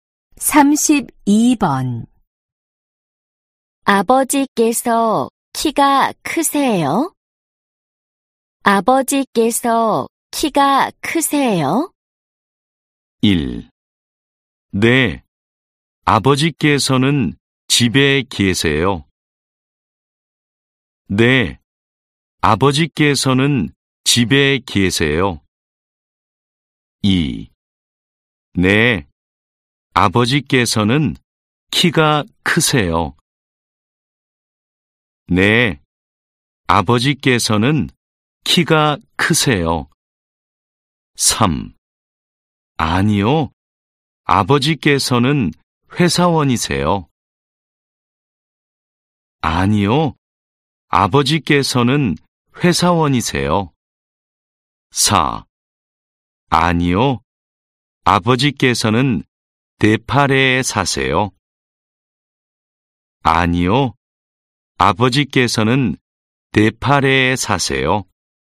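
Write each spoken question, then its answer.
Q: 아버지께서 키가 크세요?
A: 2: 네, 아버지께서는 키가 크세요.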